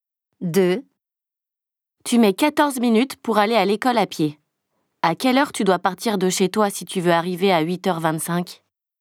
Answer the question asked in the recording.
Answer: 8h11.